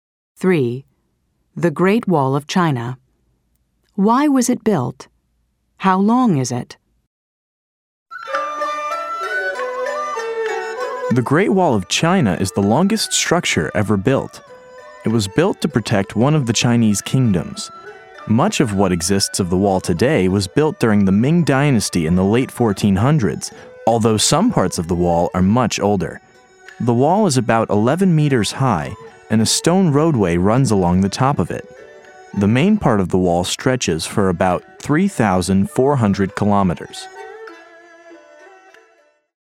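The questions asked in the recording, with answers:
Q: Why was it built?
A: To protect one of the Chinese kingdoms

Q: How long is it?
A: About 3,400 kilometers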